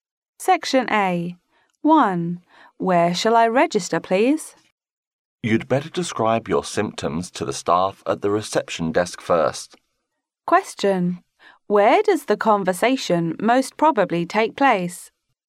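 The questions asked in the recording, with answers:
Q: Where does the conversation most probably take place?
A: In a hospital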